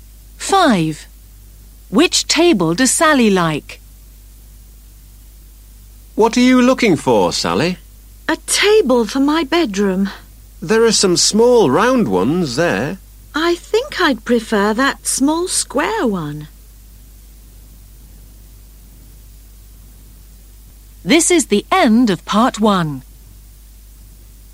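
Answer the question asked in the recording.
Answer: The small square one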